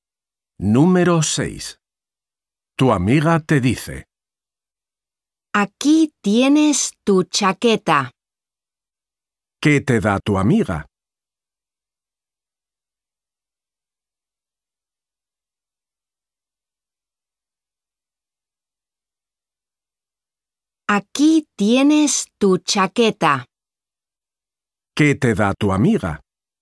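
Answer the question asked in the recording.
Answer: tu chaqueta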